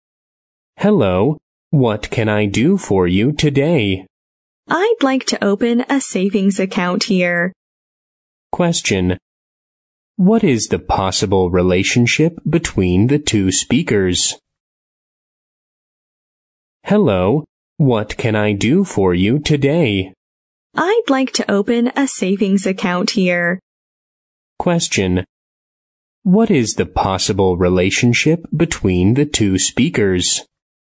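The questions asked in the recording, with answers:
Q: What is the possible relationship between the two speakers?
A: Bank clerk and customer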